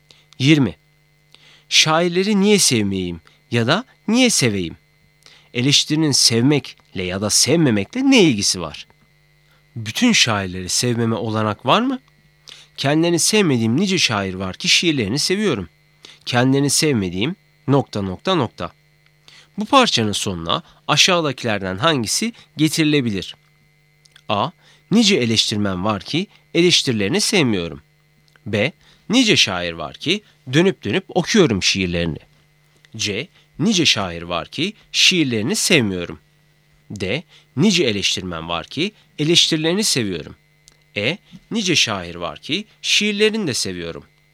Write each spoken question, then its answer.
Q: Bu parçanın sonuna aşağıdakilerden hangisi getirilebilir?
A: Doğru cevap C. Nice şair var ki şiirlerini sevmiyorum.